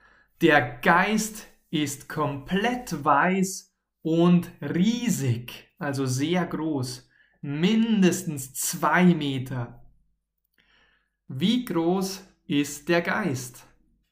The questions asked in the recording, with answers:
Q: Wie groß ist der Geist?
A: Mindestens, mindestens zwei Meter.